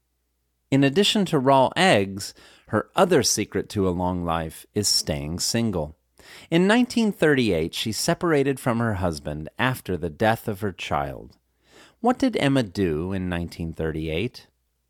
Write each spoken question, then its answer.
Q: What did Emma do in 1938?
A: In 1938, Emma separated from her husband after the death of her child.